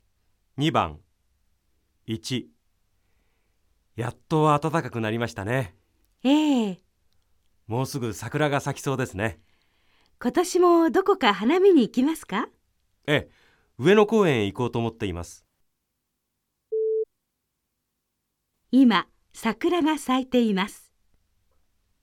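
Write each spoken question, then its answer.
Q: 今、桜が咲いています。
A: ×(まだ咲いていない)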